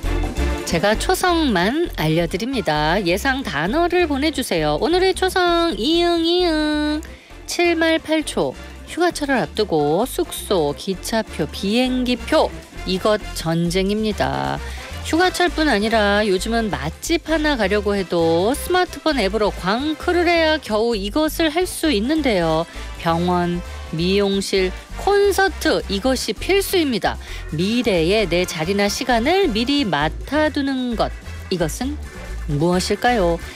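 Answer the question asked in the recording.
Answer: 예약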